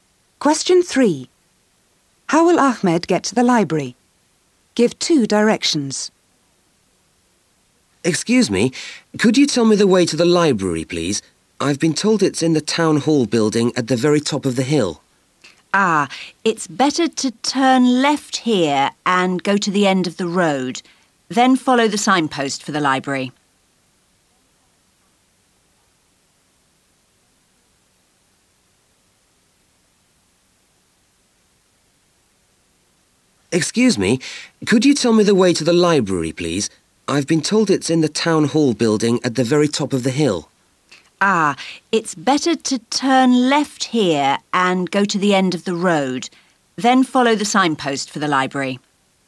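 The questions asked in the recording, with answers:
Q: How will Ahmed get to the library?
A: Turn left, go to the end of the road, then follow the signpost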